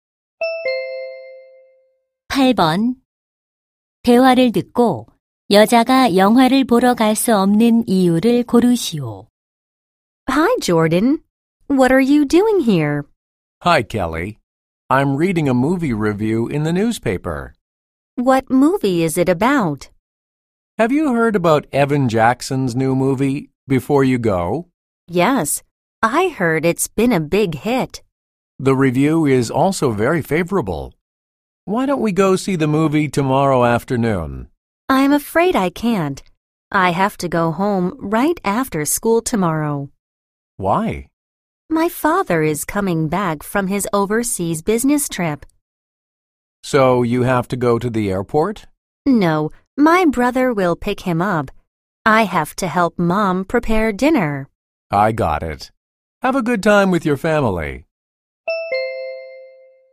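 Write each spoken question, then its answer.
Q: 대화를 듣고 여자가 영화를 보러 갈 수 없는 이유를 고르시오.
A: 엄마가 저녁 준비하는 것을 도와야 해서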